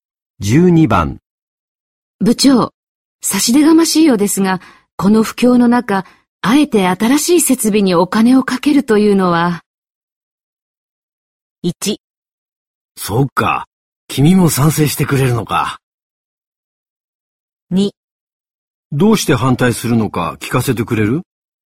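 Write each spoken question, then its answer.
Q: 部長、差し出がましいようですが、この不況の中、あえて新しい設備にお金をかけるというのは。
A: 2: どうして反対するのか聞かせてくれる?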